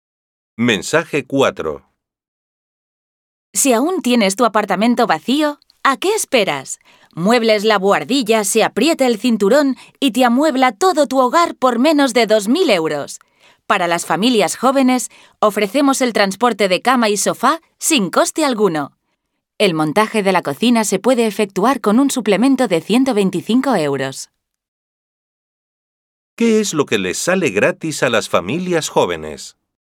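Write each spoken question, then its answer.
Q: ¿Qué es lo que les sale gratis a las familias jóvenes?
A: El transporte de cama y sofá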